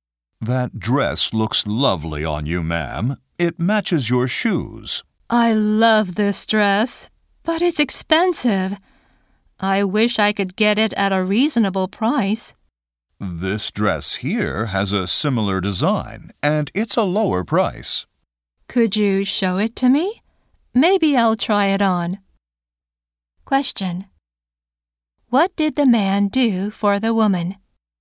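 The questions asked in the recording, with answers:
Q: What did the man do for the woman?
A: He showed her a similar, cheaper dress.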